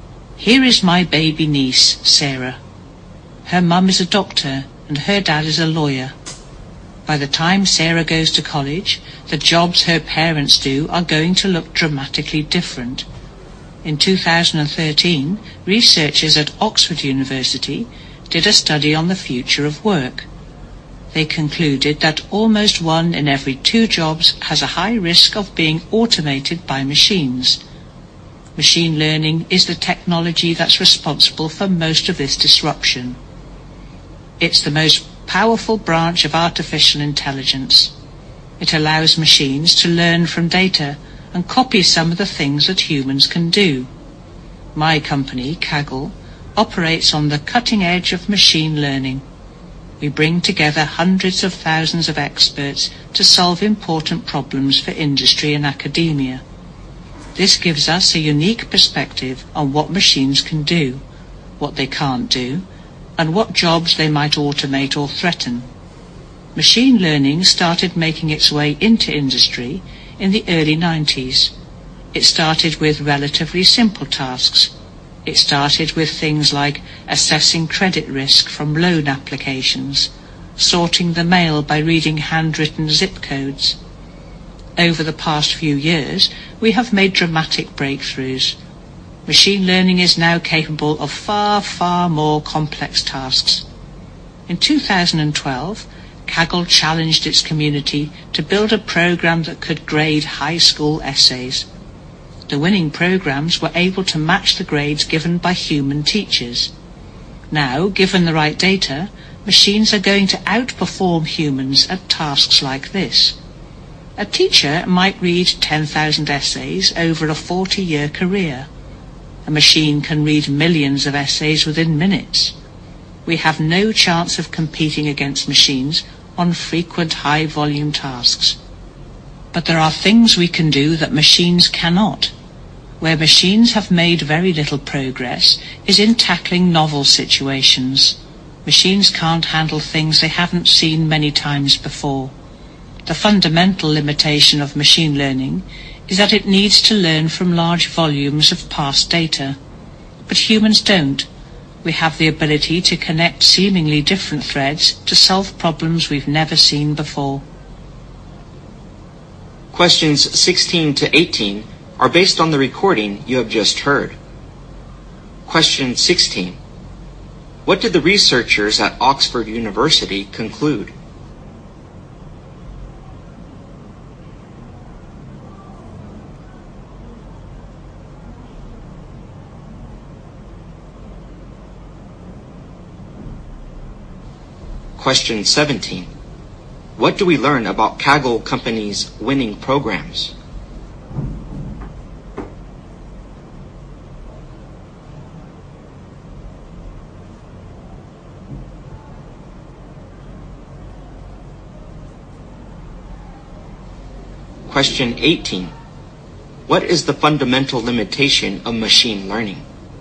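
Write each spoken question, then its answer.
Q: What did the researchers at Oxford University conclude?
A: Almost one in two jobs has a high risk of being automated

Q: What do we learn about Kaggle Company's winning programs?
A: They could grade high school essays as well as human teachers

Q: What is the fundamental limitation of machine learning?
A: It needs to learn from large volumes of past data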